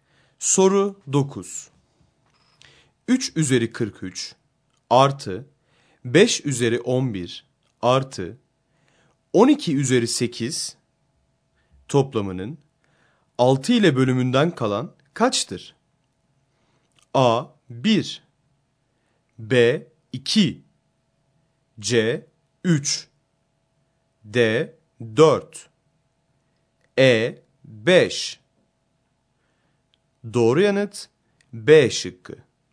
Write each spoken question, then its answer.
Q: 3 üzeri 43 artı 5 üzeri 11 artı 12 üzeri 8 toplamının 6 ile bölümünden kalan kaçtır?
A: Doğru yanıt B şıkkı.